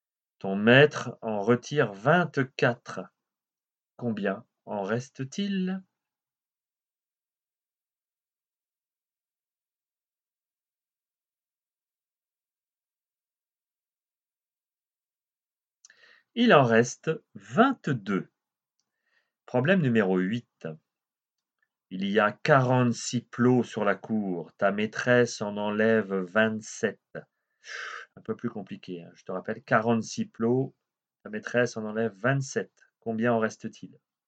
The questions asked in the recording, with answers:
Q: Combien en reste-t-il?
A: Il en reste 19.